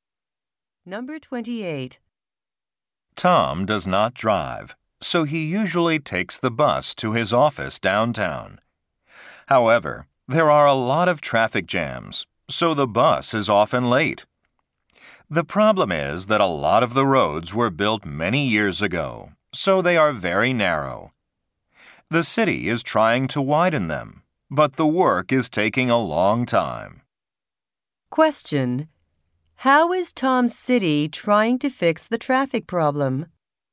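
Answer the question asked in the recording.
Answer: By widening the roads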